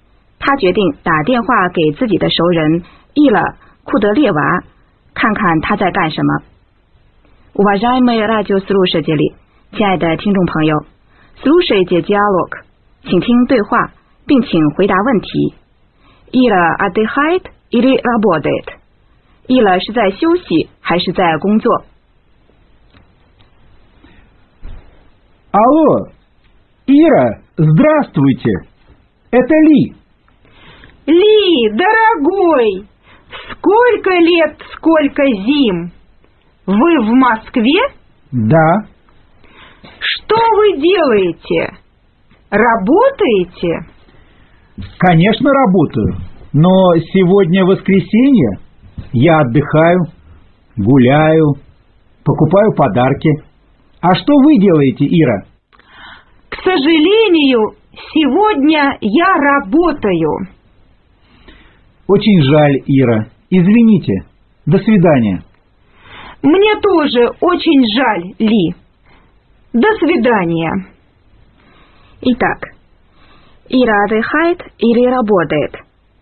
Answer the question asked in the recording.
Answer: 正确的答案是 работает.